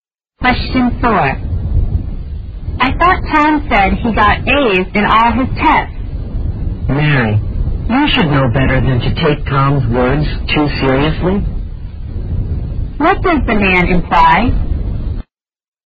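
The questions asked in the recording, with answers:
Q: What does the man imply?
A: What Tom says can't be trusted; he often exaggerates.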